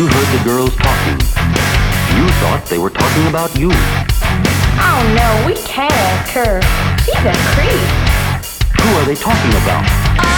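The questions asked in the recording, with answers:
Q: Who are they talking about?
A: Kurt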